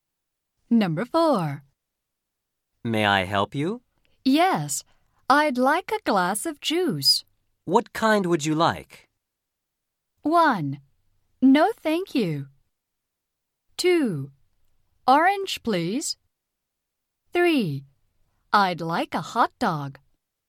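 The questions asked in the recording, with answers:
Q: What kind would you like?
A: 2: Orange, please.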